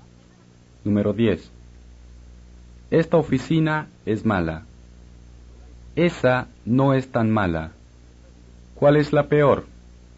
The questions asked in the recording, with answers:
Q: ¿Cuál es la peor?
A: Esta oficina. O, esta es la peor.